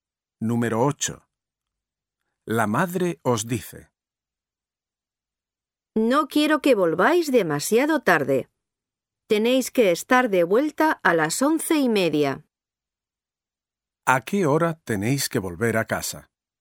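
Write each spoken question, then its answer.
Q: ¿A qué hora tenéis que volver a casa?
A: a las 11:30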